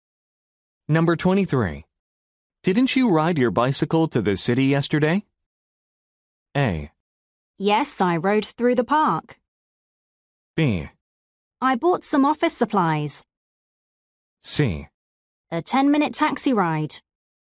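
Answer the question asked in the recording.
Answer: A: Yes, I rode through the park.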